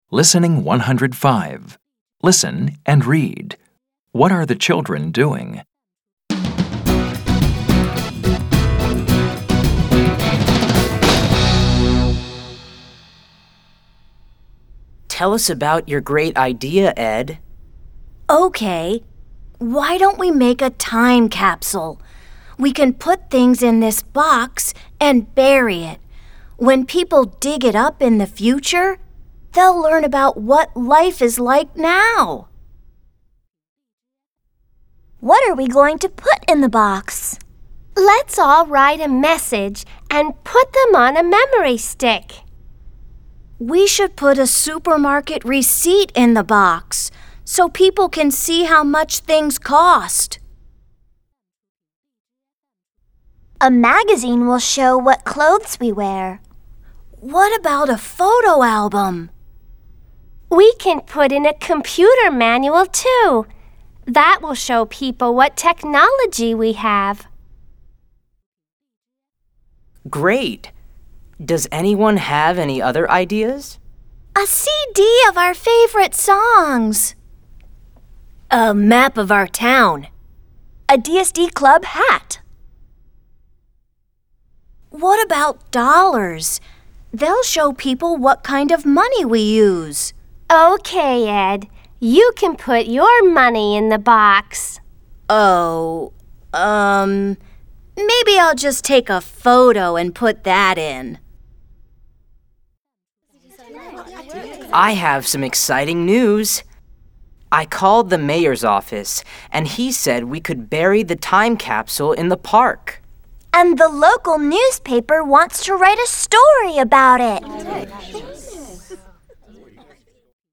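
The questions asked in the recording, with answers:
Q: What are the children doing?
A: They are planning a time capsule to bury, deciding what to put in the box.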